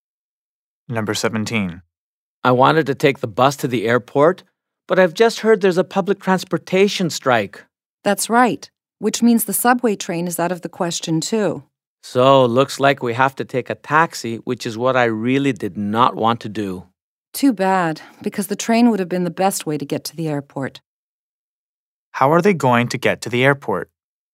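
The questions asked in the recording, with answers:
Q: How are they going to get to the airport?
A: By taxi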